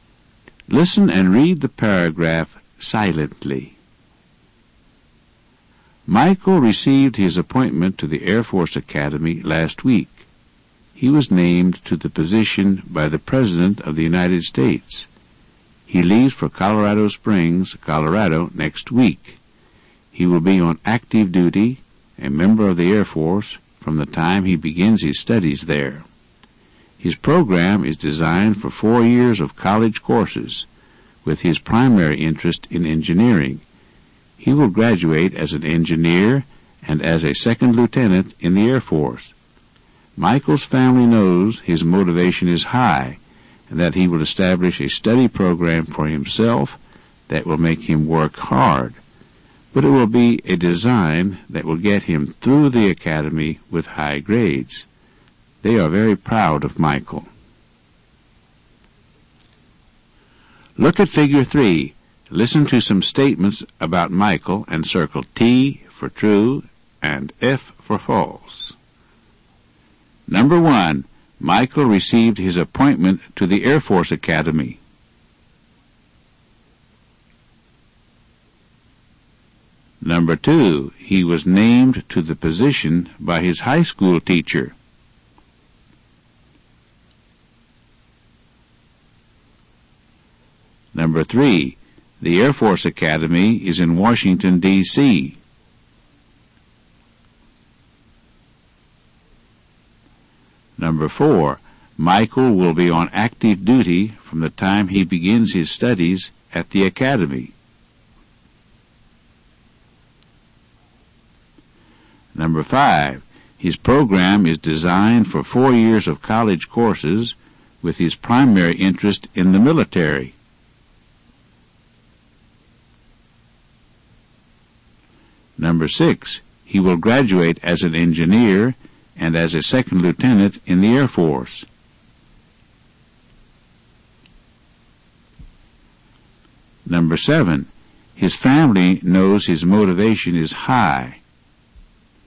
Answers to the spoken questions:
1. Number one is true.
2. Number two is false.
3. Number three is false.
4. Number four is true.
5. Number five is false.
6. Number six is true.
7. Number seven is true.